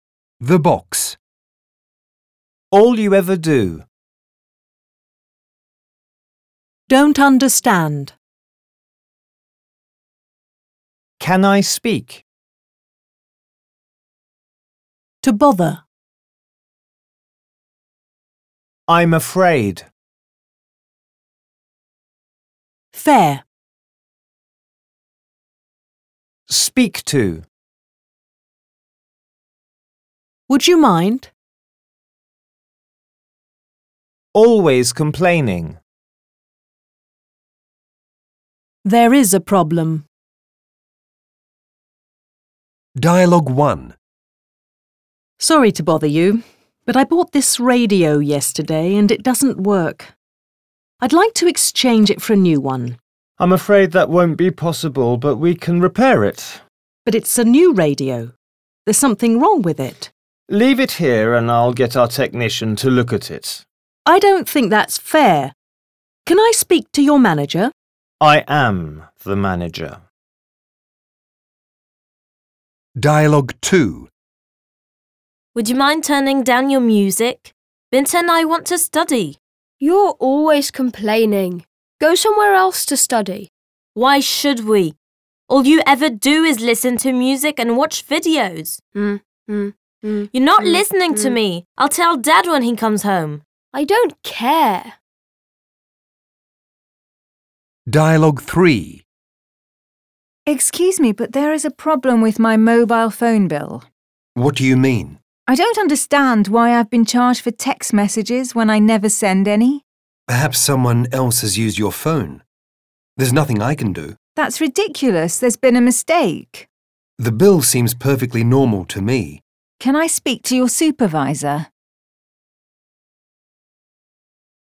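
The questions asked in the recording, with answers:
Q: In which dialogue do the people know each other?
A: Dialogue 2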